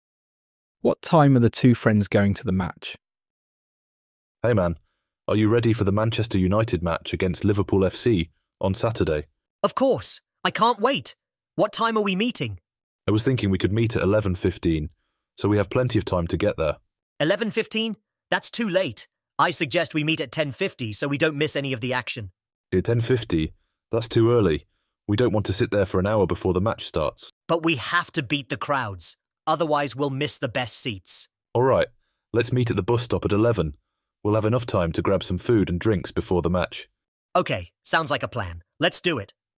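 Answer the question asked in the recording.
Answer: At 11 o'clock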